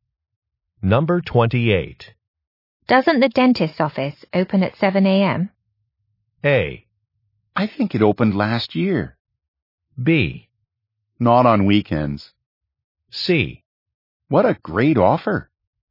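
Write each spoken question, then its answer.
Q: Doesn't the dentist's office open at 7 a.m.?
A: B: Not on weekends.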